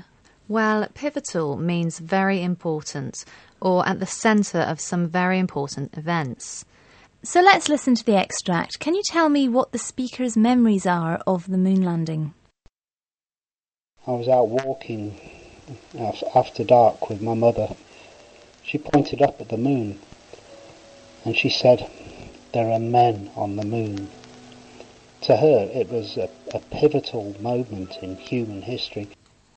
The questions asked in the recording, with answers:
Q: Can you tell me what the speaker's memories are of the moon landing?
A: Well, the speaker was out walking with his mother, who pointed up to the moon and told him, "There are men on the moon."